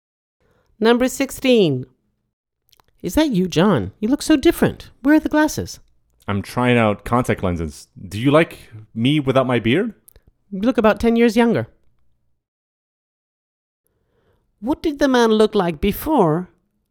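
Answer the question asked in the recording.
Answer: He wore glasses and had a beard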